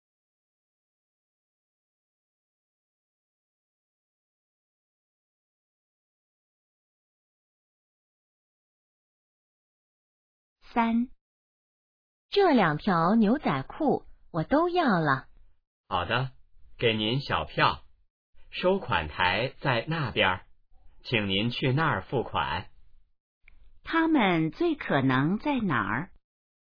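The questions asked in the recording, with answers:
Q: 他们最可能在哪儿?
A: 商店(服装店)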